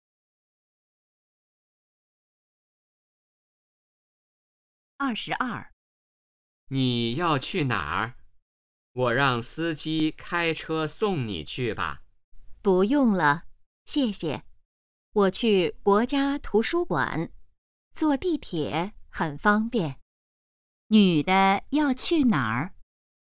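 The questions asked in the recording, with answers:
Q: 女的要去哪儿?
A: 国家图书馆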